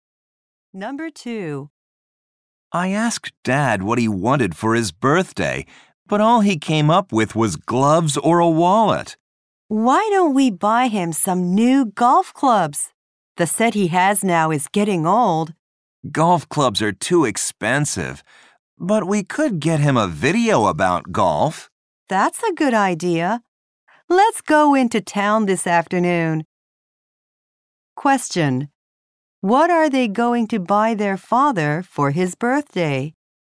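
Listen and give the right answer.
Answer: A video about golf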